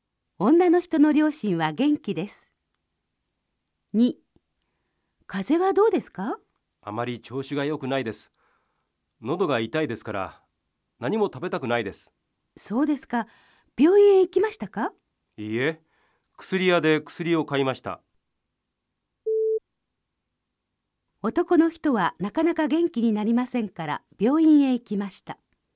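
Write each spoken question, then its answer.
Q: 男の人はなかなか元気になりませんから、病院へ行きました。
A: 正しくない(薬屋で薬を買った)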